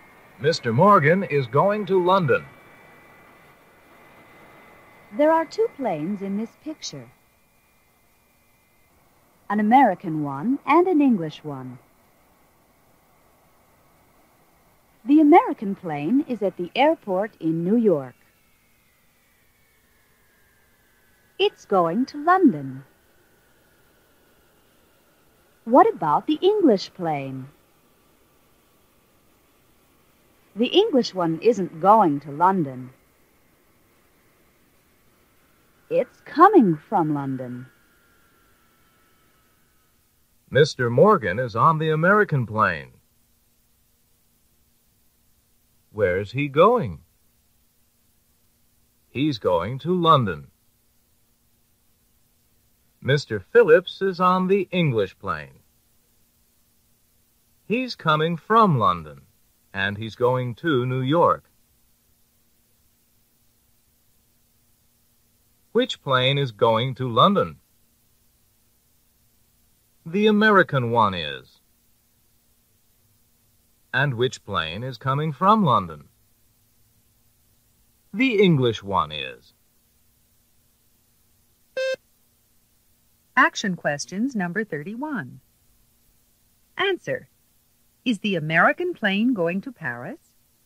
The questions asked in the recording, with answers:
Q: Is the American plane going to Paris?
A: No, it's not.